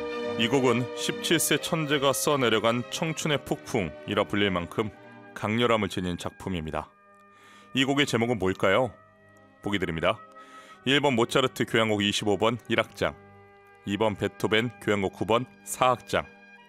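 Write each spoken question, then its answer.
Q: 이 곡의 제목은 뭘까요?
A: 1번: 모차르트 교향곡 25번 1악장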